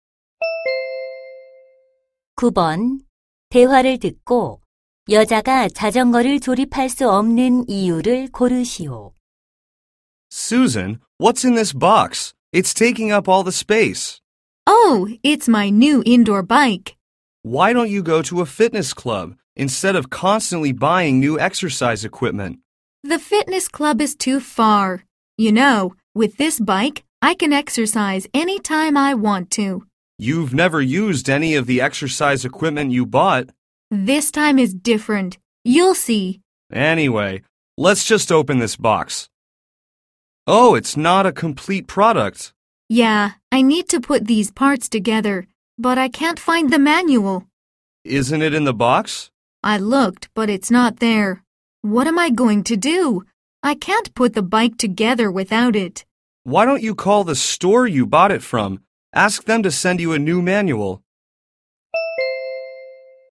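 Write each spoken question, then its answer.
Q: 대화를 듣고 여자가 자전거를 조립할 수 없는 이유를 고르시오.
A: 설명서를 찾을 수 없어서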